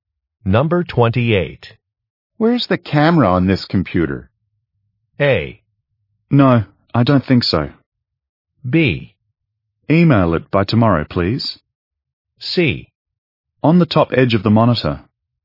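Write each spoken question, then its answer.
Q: Where's the camera on this computer?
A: C: On the top edge of the monitor.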